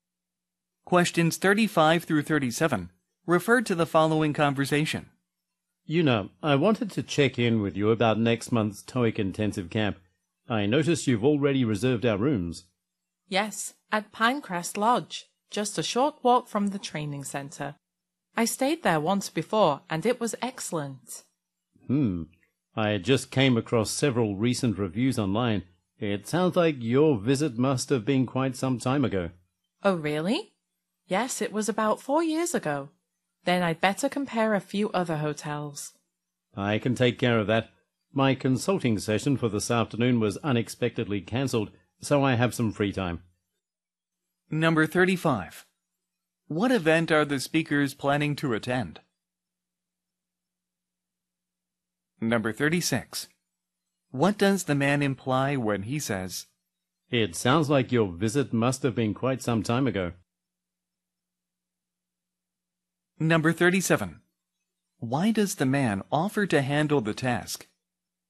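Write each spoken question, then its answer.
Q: What event are the speakers planning to attend?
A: A TOEIC intensive camp

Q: What does the man imply when he says,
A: The lodge may have changed for the worse since her stay, based on recent reviews

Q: Why does the man offer to handle the task?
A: His afternoon consulting session was cancelled, so he has free time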